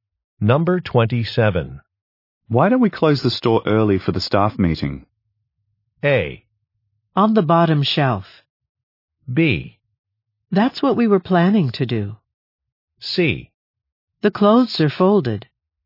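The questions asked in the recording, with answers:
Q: Why don't we close the store early for the staff meeting?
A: B: That's what we were planning to do.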